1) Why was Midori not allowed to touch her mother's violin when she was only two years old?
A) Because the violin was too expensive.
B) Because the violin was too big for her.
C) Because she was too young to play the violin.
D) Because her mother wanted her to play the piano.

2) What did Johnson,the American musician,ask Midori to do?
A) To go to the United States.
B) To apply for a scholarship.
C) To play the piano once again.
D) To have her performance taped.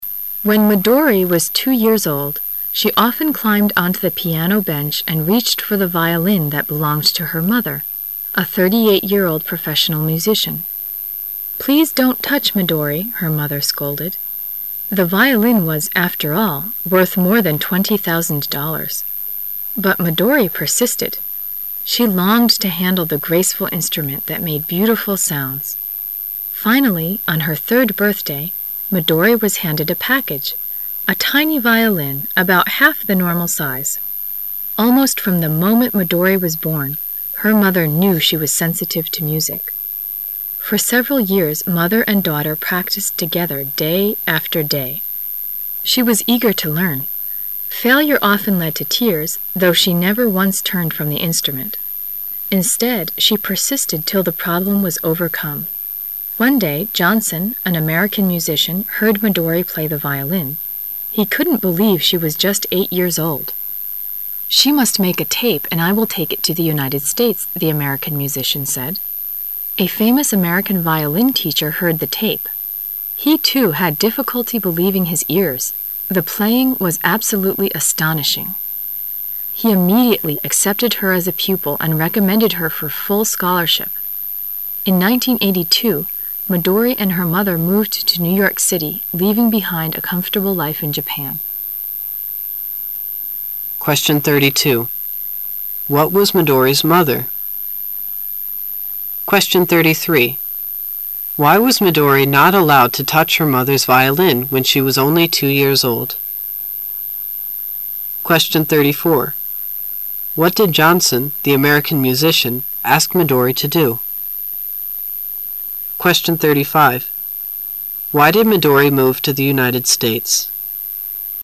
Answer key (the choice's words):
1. Because the violin was too expensive.
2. To have her performance taped.

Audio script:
[解析] 32-35 When Midori was two years old, she often climbed onto the piano bench and reached for the violin that belonged to her mother, a 38-year-old professional musician. "Please don't touch, Midori," her mother scolded. The violin was, after all, worth more than 20, 000 dollars. But Midori persisted. She longed to handle the graceful instrument that made beautiful sounds. Finally, on her third birthday, Midori was handed a package, a tiny violin, about half the normal size. Almost from the moment Midori was born, her mother knew she was sensitive to music. For several years mother and daughter practised together day after day. She was eager to learn. Failure often led to tears, though, she never once turned from the instrument. Instead, She persisted till the problem was overcome. One day, Johnson, an American musician; heard Midori play the violin. He couldn't believe she was just eight years old. "She must make a tape and I will take it to the United States, "the American musician said. A famous American violin teacher heard the tape. He, too, had difficulty believing his ears. The playing was absolutely astonishing. He immediately accepted her as a pupil and recommended her for full scholarship. In 1982, Midori and her mother moved to New York City, leaving behind a comfortable life in Japan. What was Midori's mother?